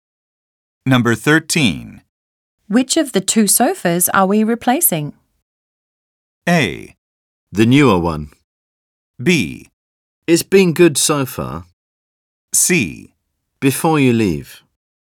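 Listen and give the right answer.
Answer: A: The newer one.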